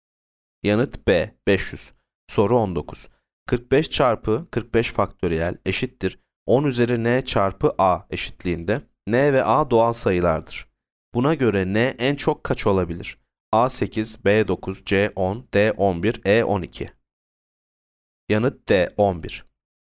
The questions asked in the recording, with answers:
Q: Buna göre n en çok kaç olabilir?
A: Yanıt D, 11.